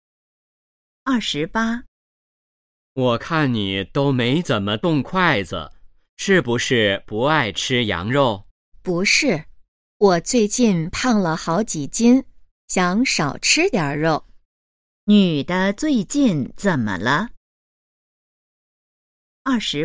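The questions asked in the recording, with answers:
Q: 女的最近怎么了?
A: 胖了好几斤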